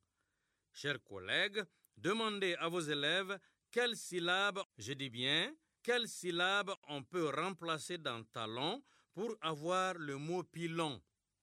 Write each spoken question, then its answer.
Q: quelle syllabe on peut remplacer dans talon pour avoir le mot pilon.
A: Dans talon, on remplace la syllabe ta par la syllabe pi pour avoir pilon.